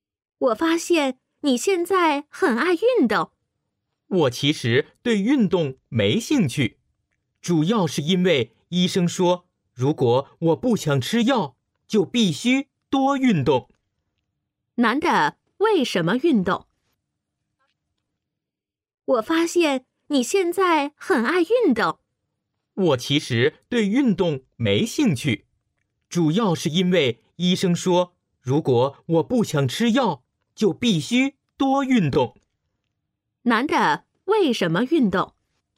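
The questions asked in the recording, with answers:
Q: 男的为什么运动?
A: 医生说不想吃药就必须多运动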